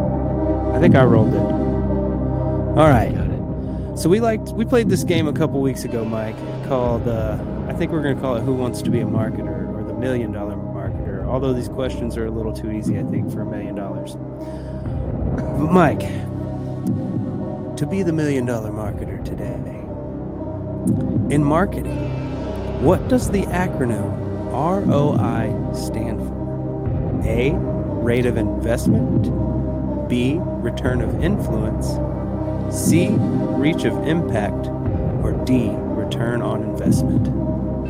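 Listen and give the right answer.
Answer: D: return on investment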